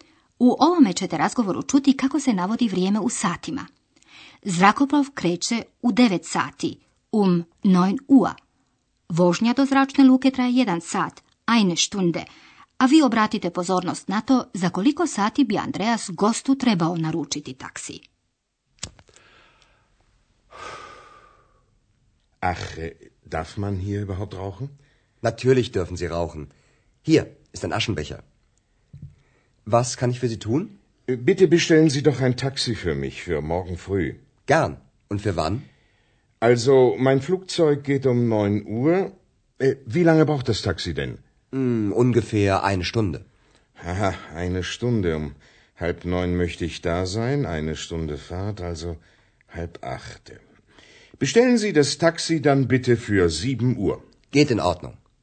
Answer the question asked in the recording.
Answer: Andreas bi dakle trebao naručiti taksi za sljedeće jutro u sedam sati.